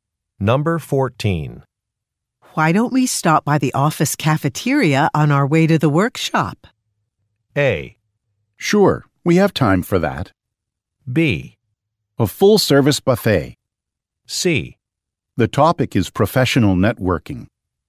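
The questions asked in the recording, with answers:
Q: Why don't we stop by the office cafeteria on our way to the workshop?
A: A: Sure, we have time for that.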